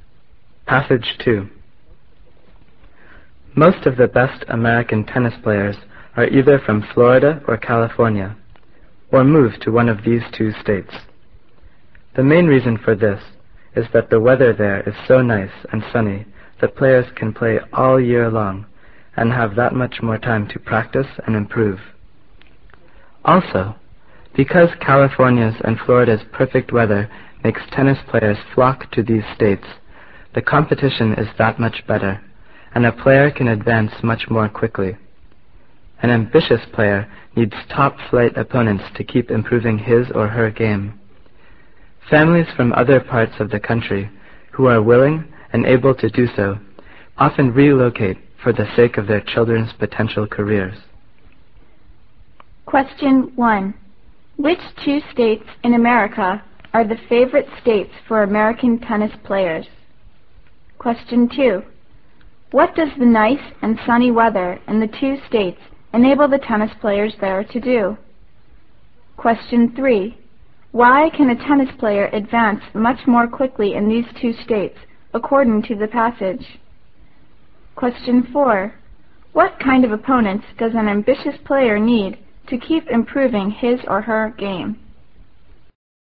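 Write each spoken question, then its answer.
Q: Which 2 states in America are the favorite states for American tennis players?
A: Florida and California

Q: What does the nice and sunny weather in the 2 states enable the tennis players there to do?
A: Play all year long and have more time to practice and improve

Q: Why can a tennis player advance much more quickly in these 2 states, according to the passage?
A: Because the competition is much better

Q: What kind of opponents does an ambitious player need to keep improving his or her game?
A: Top-flight opponents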